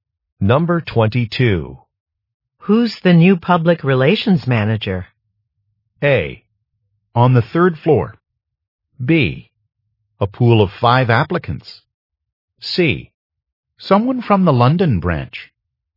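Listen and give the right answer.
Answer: C: Someone from the London branch.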